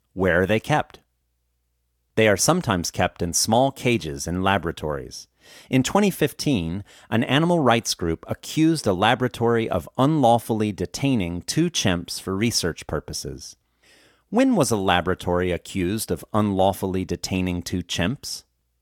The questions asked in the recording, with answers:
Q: When was a laboratory accused of unlawfully detaining two chimps?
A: A laboratory was accused of unlawfully detaining two chimps in 2015.